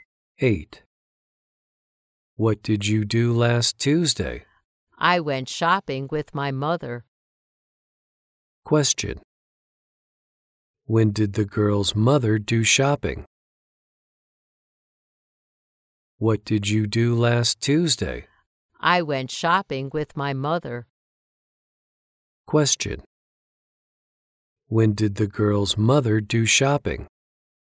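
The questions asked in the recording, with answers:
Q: When did the girl's mother do shopping?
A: Last Tuesday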